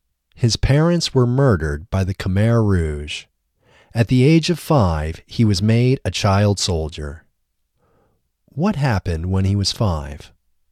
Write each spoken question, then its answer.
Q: What happened when he was 5?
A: When he was 5, he was made a child soldier.